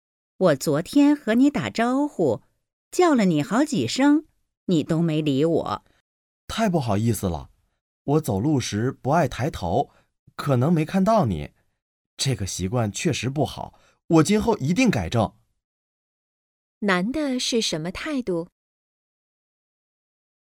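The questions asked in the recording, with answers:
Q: 男的是什么态度?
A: 道歉,承认错误并愿意改正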